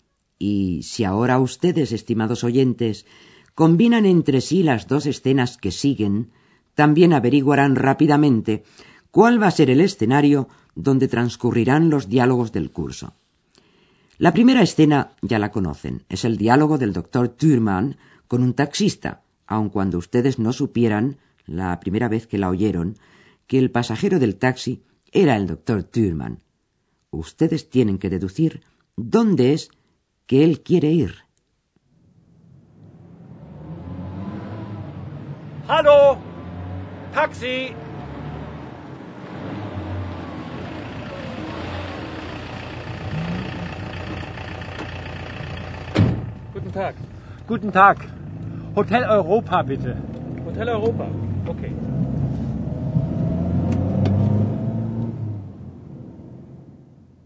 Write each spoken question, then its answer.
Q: Ustedes tienen que deducir dónde es que él quiere ir.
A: Así pues, el doctor Thürmann desea que el taxista le lleve al Hotel Europa.